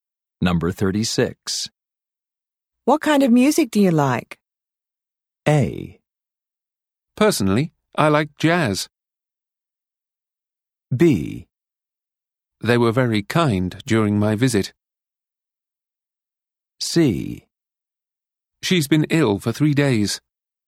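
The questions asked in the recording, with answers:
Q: What kind of music do you like?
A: A: Personally, I like jazz.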